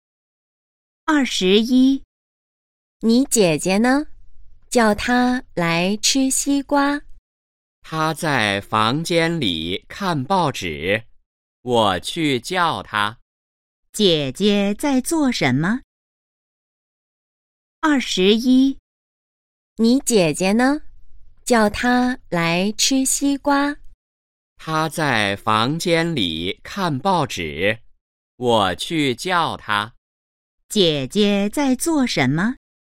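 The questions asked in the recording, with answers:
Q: 姐姐在做什么?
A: 看报纸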